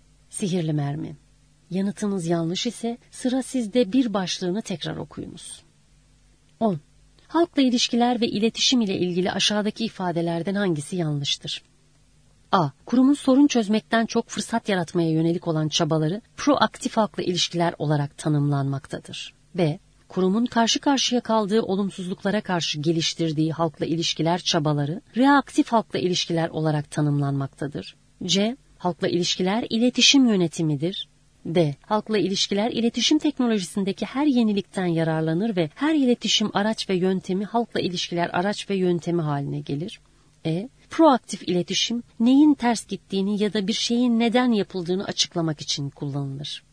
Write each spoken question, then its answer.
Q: Halkla ilişkiler ve iletişim ile ilgili aşağıdaki ifadelerden hangisi yanlıştır?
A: Doğru cevap E. Proaktif iletişim neyin ters gittiğini ya da bir şeyin neden yapıldığını açıklamak için kullanılır.